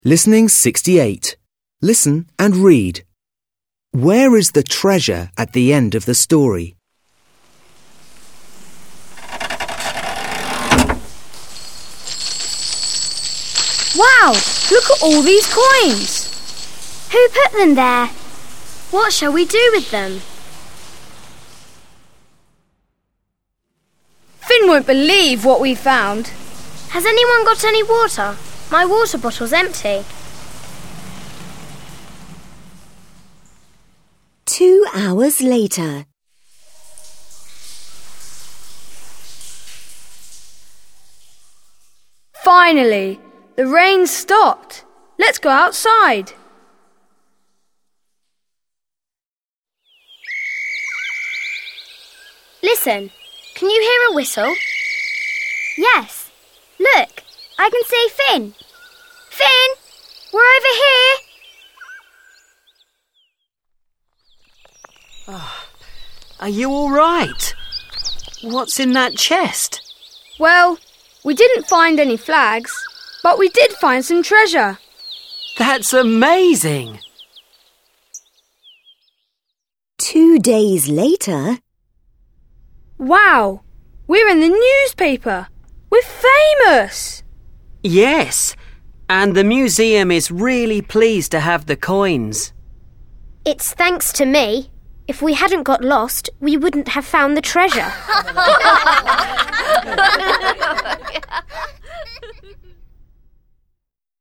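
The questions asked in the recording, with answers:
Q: Where is the treasure at the end of the story?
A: In the museum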